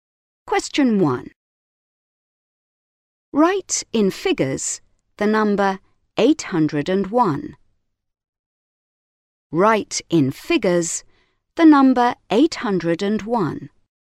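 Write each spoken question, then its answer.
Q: Write in figures the number 801.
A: 801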